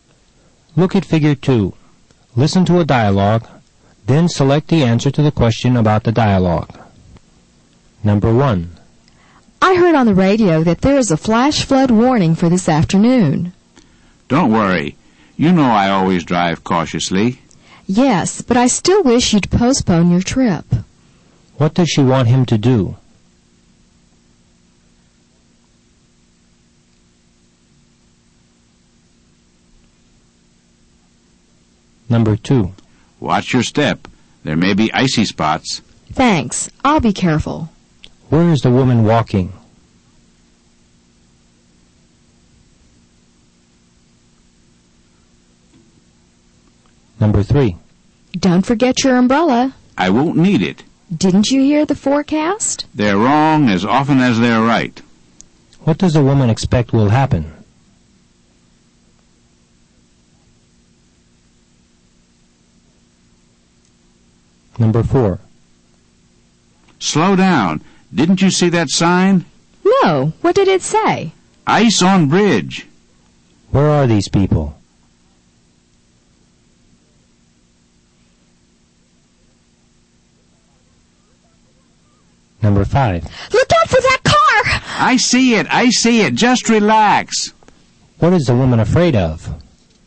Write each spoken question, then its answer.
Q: What does she want him to do?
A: Number 1 is B. She wants him to stay at home today.

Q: What does a woman expect will happen?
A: Number 3 is C. The woman expects rain will begin to fall soon.

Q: Where are these people?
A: Number 4 is A. They are in an automobile.

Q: What is the woman afraid of?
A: Number 5 is B. She is afraid they may hit the car and have an accident.